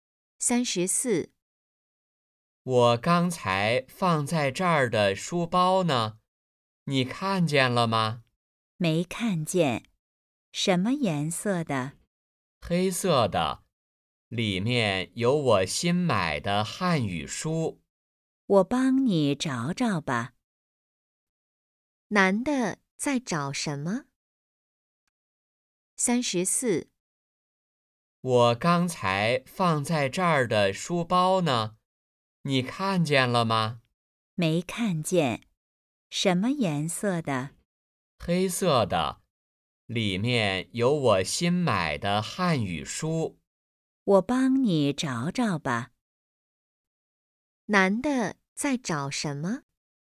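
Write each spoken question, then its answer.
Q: 男的在找什么?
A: 书包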